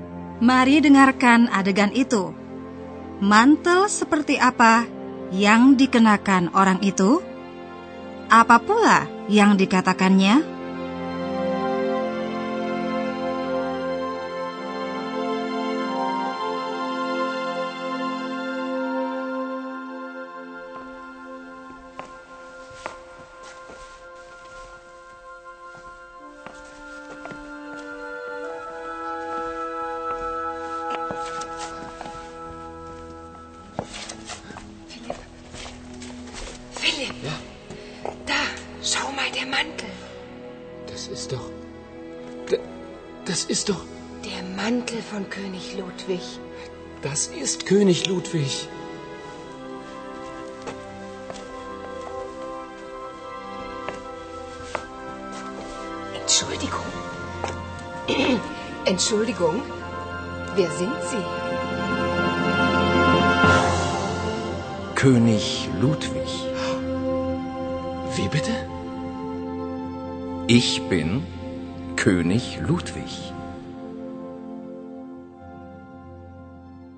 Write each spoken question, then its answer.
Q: Apa pula yang dikatakannya?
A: orang itu menyatakan bahwa dia sendirilah Raja Ludwig